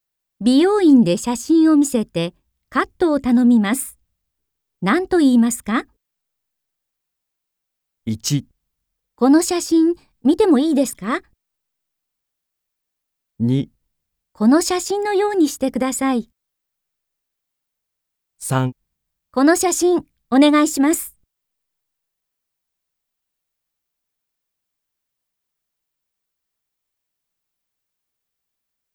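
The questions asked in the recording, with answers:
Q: 美容院で写真を見せてカットを頼みます。何と言いますか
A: 2: この写真のようにしてください。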